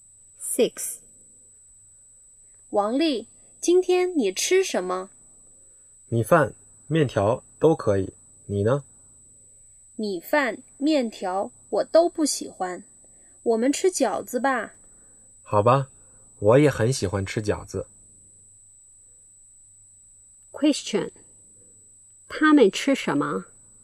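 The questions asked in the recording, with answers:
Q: 他们吃什么?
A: 饺子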